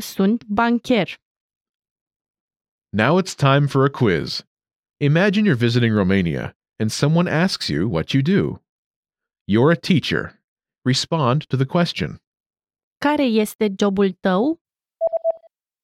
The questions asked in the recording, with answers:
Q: Care este jobul tău?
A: Eu sunt profesor.